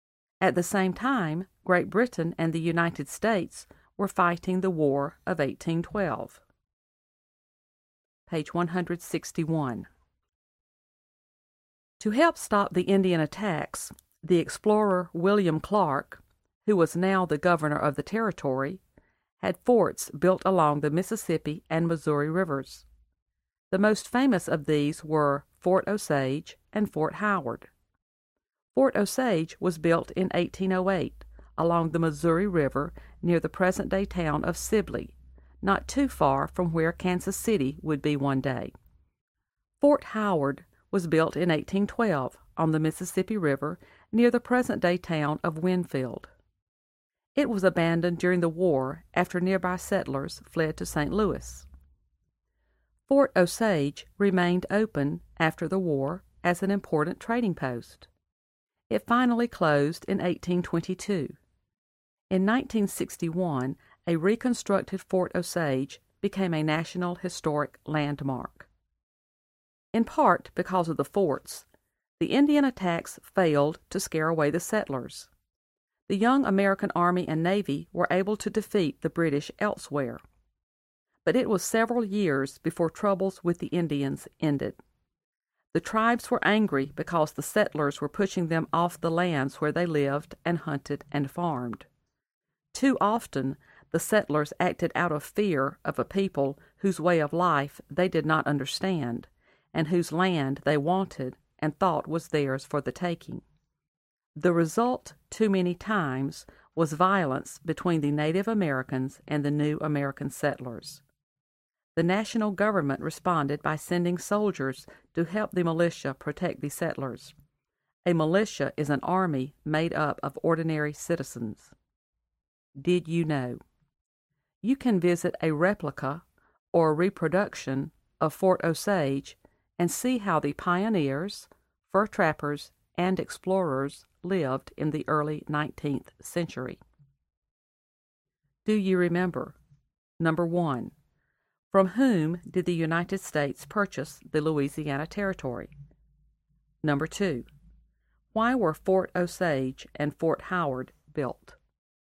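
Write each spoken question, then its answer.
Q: Number two, why were Fort Osage and Fort Howard built?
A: To help stop the Indian attacks on the settlers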